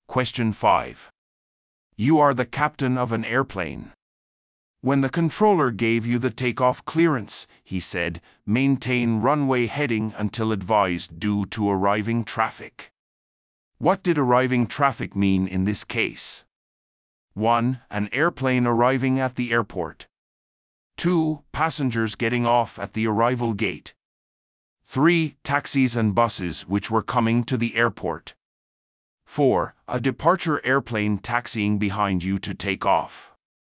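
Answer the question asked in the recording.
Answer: 1: An airplane arriving at the airport.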